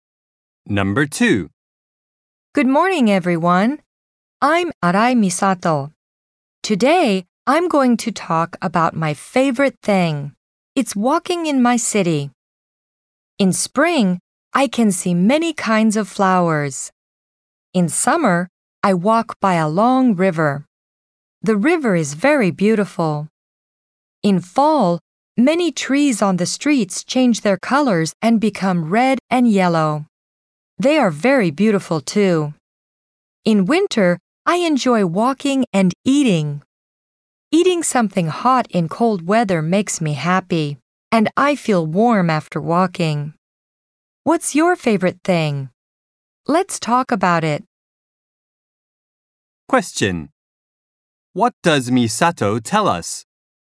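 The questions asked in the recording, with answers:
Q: What does Misato tell us?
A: She enjoys walking in her city in every season.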